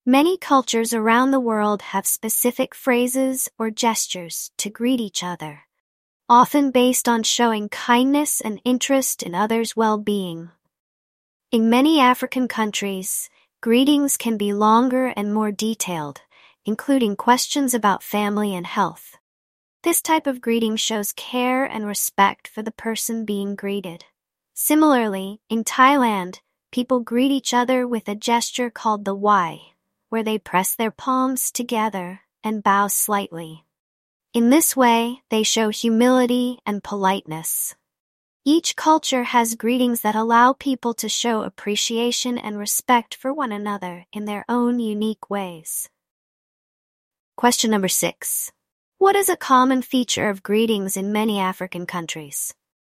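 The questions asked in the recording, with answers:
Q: What is a common feature of greetings in many African countries?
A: They can be longer and more detailed, including questions about family and health.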